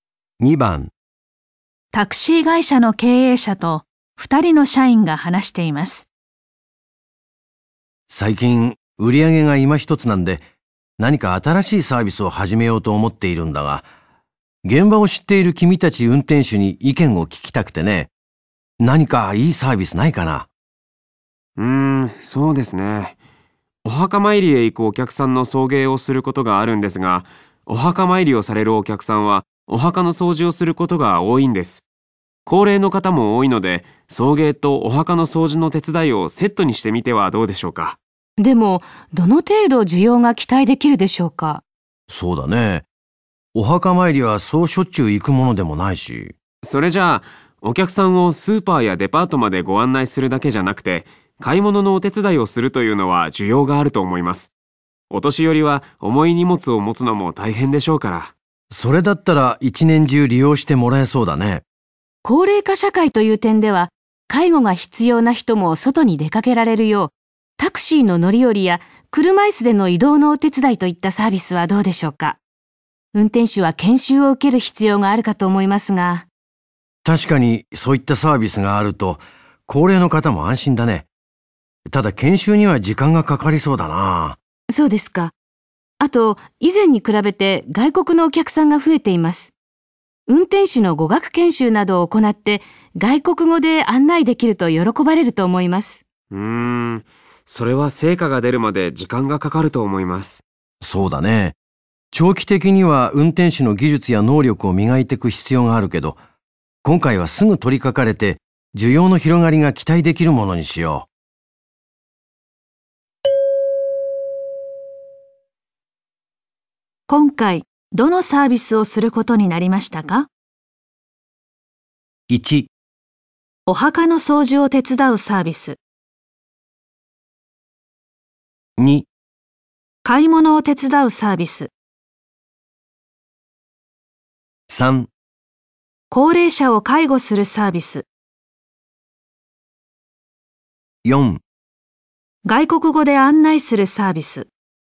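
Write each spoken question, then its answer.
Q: 今回どのサービスをすることになりましたか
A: 2: 買い物を手伝うサービス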